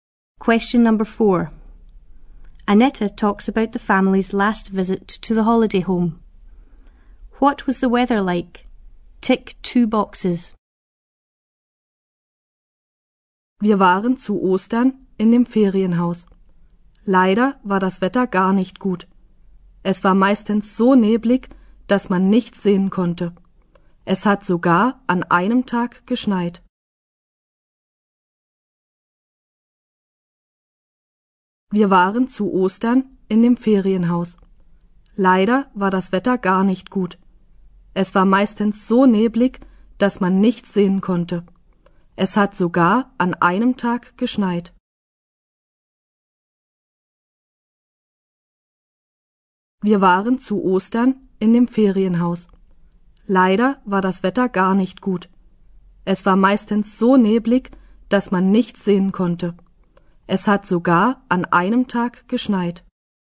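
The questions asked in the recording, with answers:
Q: What was the weather like?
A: Foggy; it snowed one day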